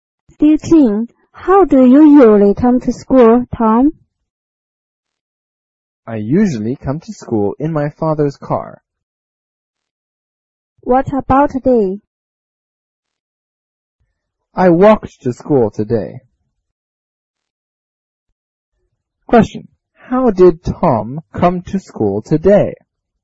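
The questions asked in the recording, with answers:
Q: How did Tom come to school today?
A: On foot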